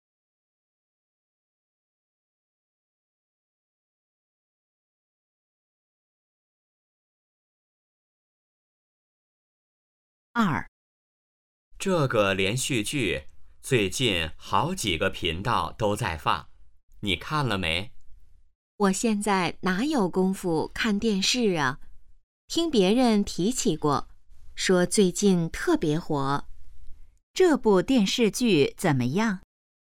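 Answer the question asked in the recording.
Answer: 最近特别火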